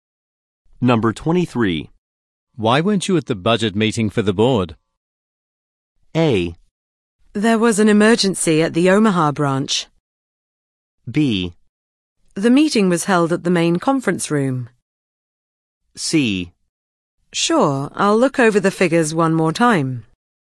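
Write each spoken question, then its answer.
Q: Why weren't you at the budget meeting for the board?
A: A: There was an emergency at the Omaha branch.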